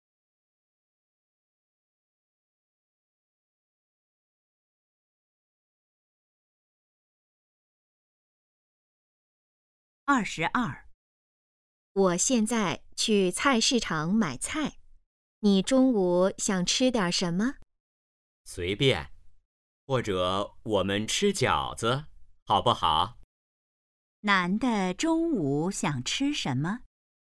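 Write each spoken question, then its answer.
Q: 男的中午想吃什么?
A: 饺子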